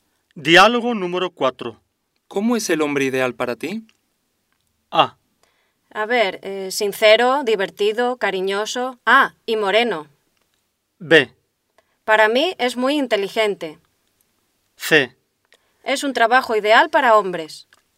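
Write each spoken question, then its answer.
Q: ¿Cómo es el hombre ideal para ti?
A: A: A ver, sincero, divertido, cariñoso. Ah, y moreno.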